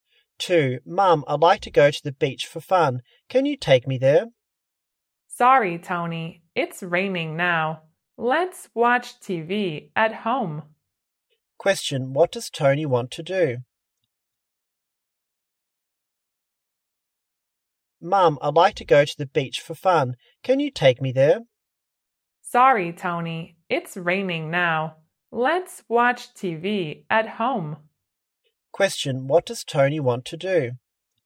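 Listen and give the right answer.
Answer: Go to the beach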